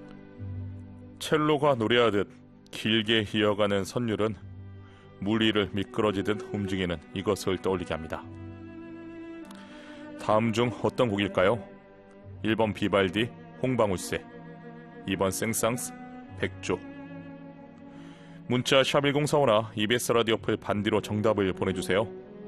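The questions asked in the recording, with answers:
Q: 다음 중 어떤 곡일까요?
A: 2: 생상스, 백조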